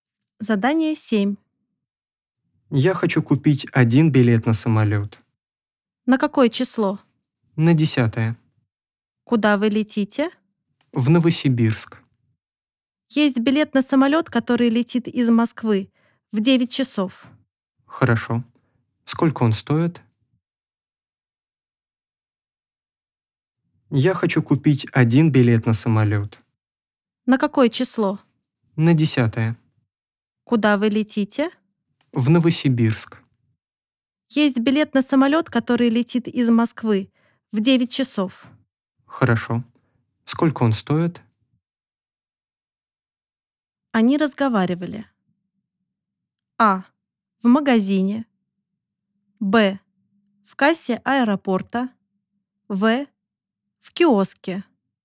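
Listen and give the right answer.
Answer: Б: В кассе аэропорта.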